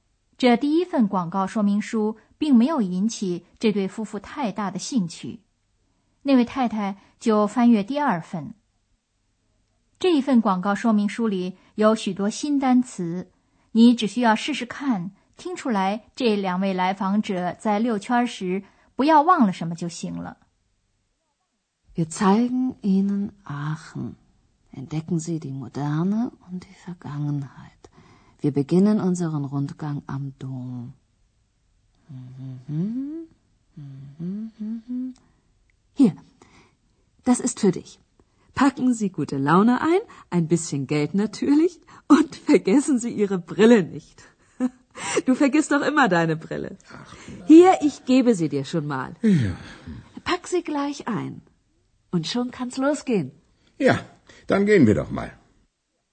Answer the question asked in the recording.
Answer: 说明书里有点诙谐地要求游客不要忘了他们的眼镜儿。